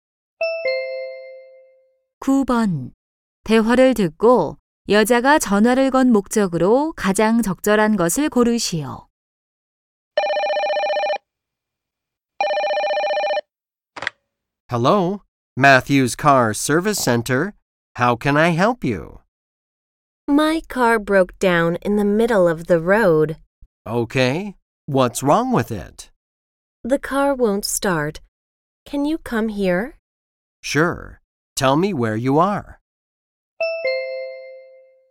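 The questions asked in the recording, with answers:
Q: 대화를 듣고 여자가 전화를 건 목적으로 가장 적절한 것을 고르시오.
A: 고장 난 차 수리(출장) 요청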